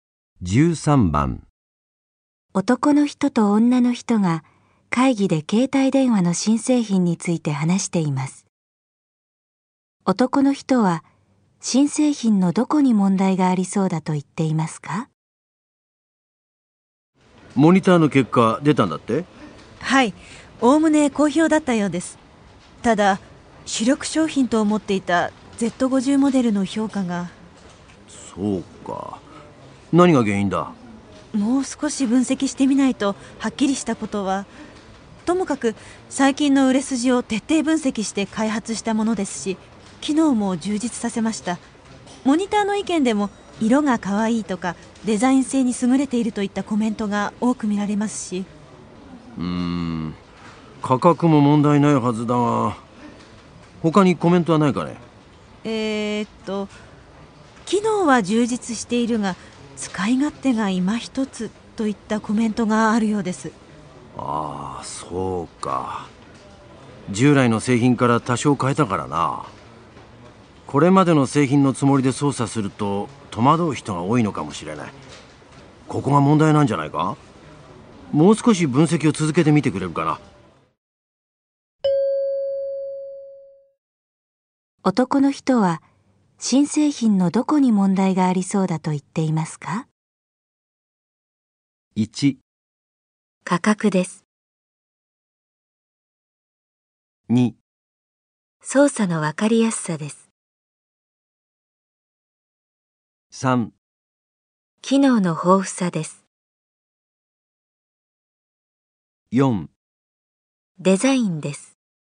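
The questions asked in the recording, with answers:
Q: 男の人は新製品のどこに問題がありそうだと言っていますか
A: 2: 操作のわかりやすさです。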